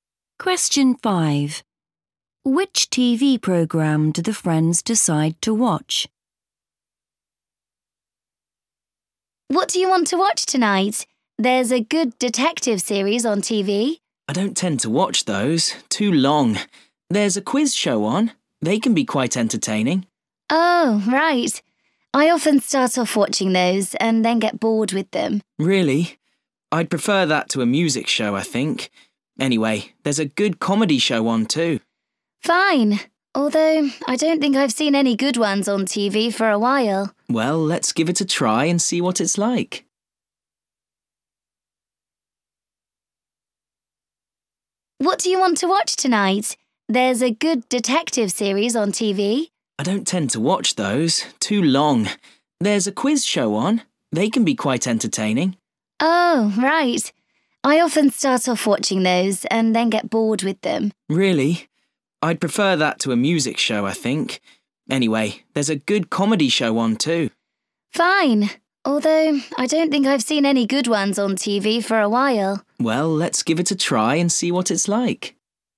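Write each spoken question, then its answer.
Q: Which TV program do the friends decide to watch?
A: a comedy show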